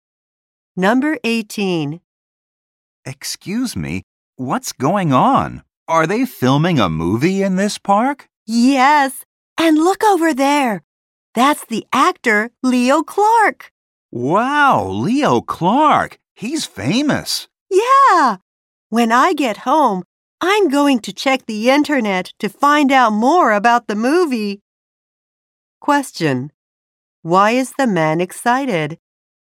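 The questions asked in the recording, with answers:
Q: Why is the man excited?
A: He saw the famous actor Leo Clark.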